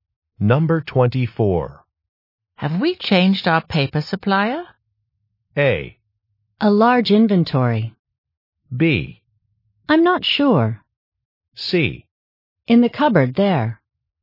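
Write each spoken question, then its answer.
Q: Have we changed our paper supplier?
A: B: I'm not sure.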